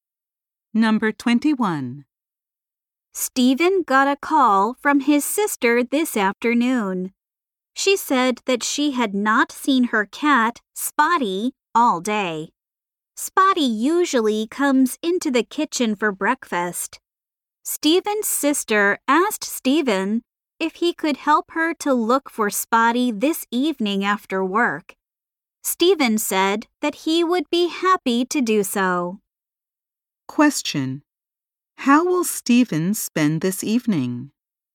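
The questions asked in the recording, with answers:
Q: How will Stephen spend this evening?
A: Helping his sister look for her cat.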